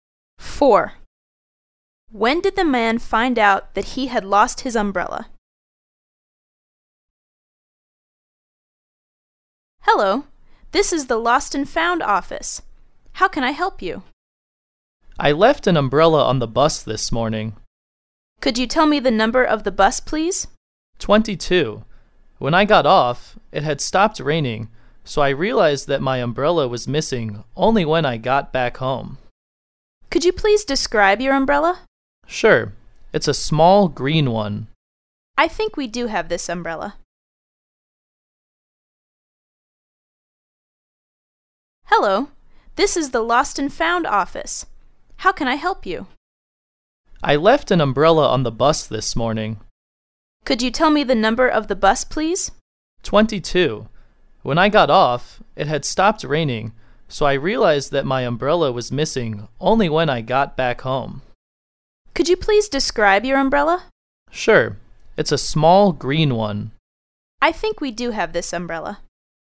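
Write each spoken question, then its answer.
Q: When did the man find out that he had lost his umbrella?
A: When he got back home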